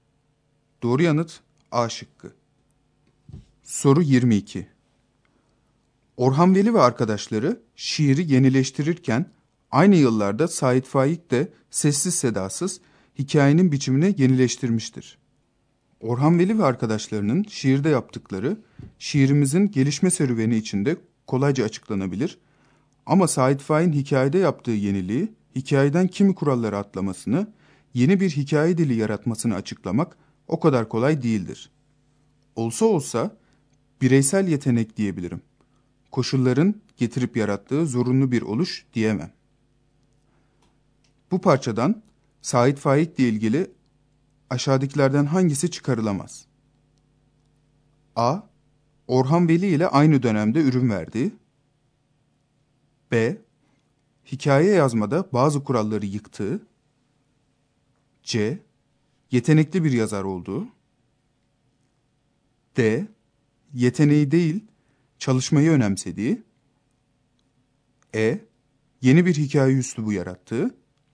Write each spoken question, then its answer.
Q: Bu parçadan Sait Faik ile ilgili aşağıdakilerden hangisi çıkarılamaz?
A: Doğru yanıt D şıkkı.